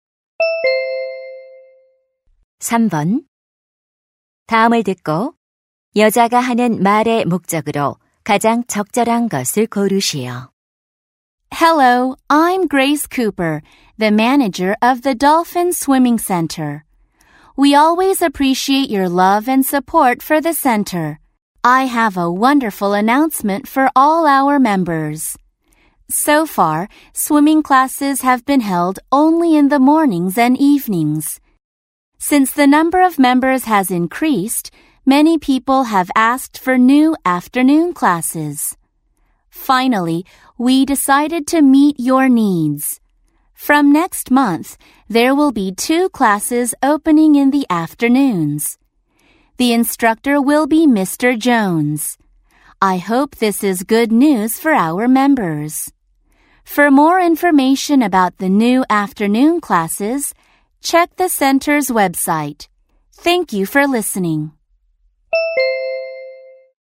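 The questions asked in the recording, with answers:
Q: 다음을 듣고 여자가 하는 말의 목적으로 가장 적절한 것을 고르시오.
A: 오후 수영 강좌 신설을 안내하려고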